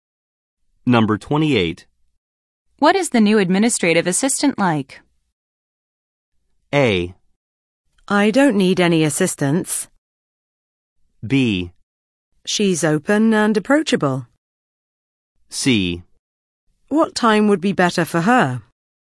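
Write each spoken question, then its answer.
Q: What is the new administrative assistant like?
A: B: She's open and approachable.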